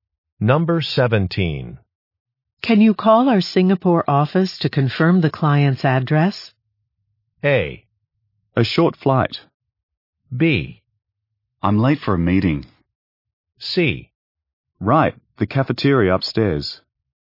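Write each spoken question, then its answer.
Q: Can you call our Singapore office to confirm the client's address?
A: B: I'm late for a meeting.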